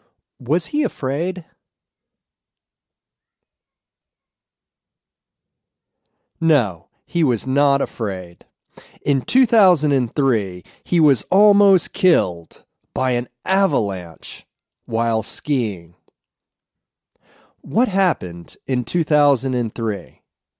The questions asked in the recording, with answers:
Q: What happened in 2003?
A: In 2003, he was almost killed by an avalanche while skiing.